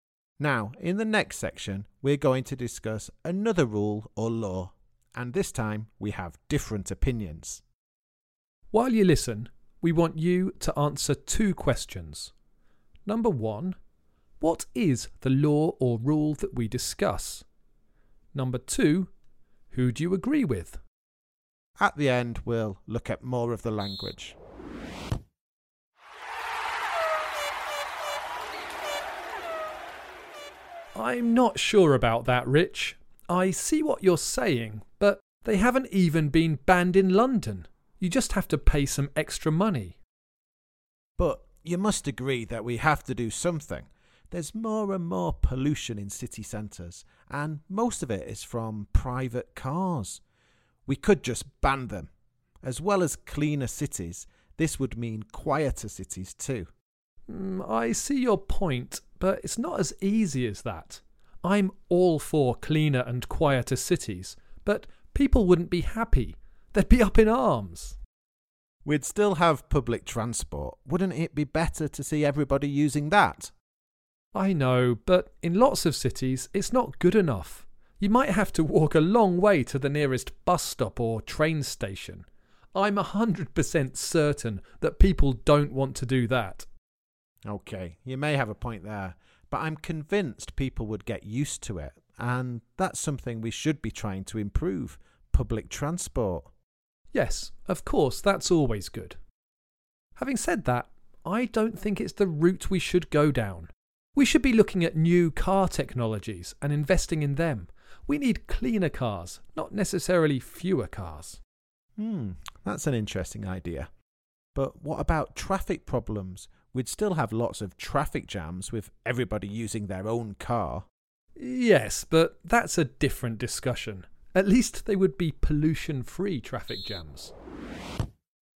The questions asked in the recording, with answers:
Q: Number one, what is the law or rule that we discuss?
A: In the last section, the rule that we discussed was whether cars should be banned in city centres.